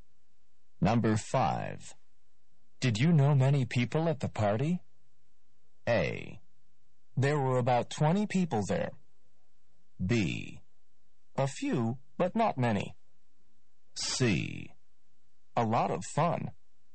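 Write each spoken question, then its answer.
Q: Did you know many people at the party?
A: B: A few, but not many.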